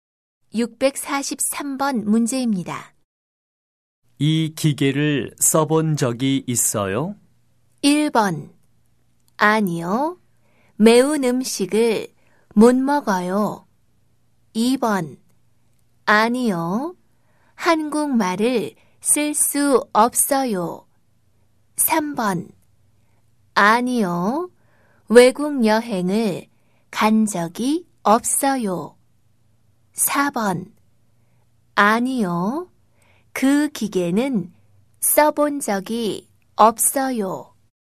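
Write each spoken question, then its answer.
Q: 이 기계를 써본 적이 있어요?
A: 4: 아니요. 그 기계는 써본 적이 없어요.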